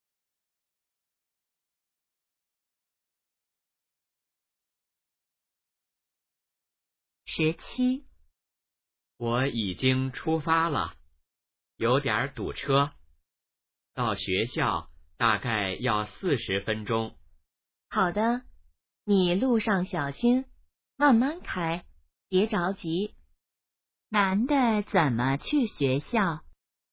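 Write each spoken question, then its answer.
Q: 男的怎么去学校?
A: 开车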